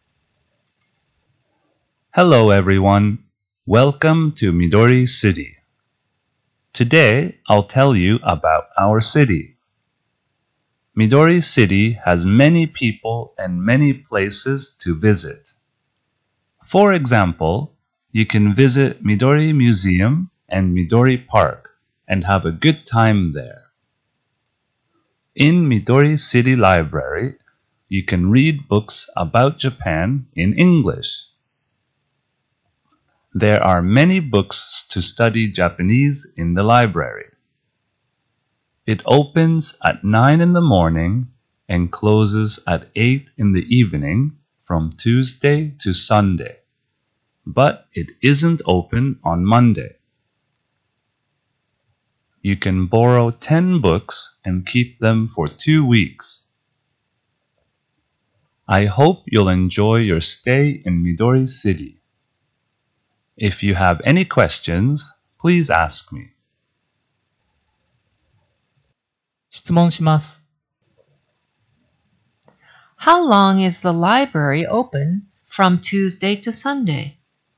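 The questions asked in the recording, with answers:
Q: How long is the library open from Tuesday to Sunday?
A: For eleven hours.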